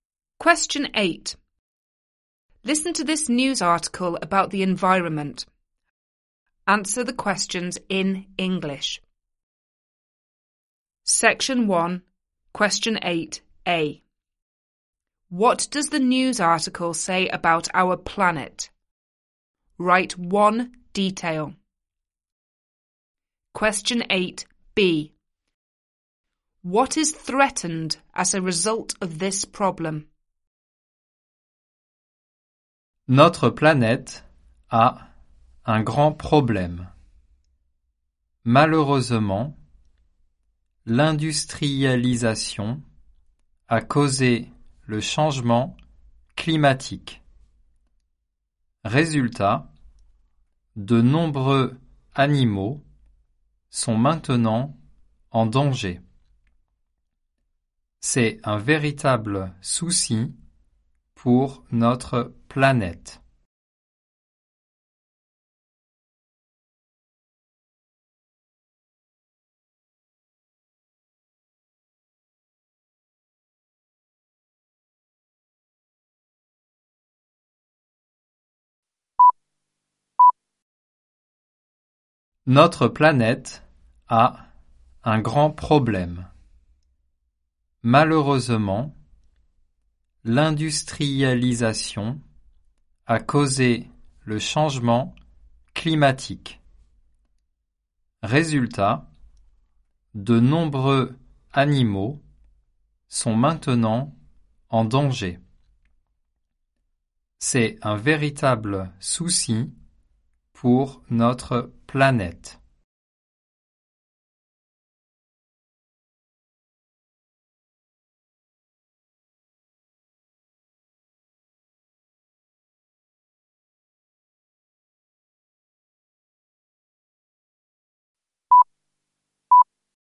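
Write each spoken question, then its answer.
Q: What does the news article say about our planet?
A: It has a big problem (climate change caused by industrialisation)

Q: What is threatened as a result of this problem?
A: Many animals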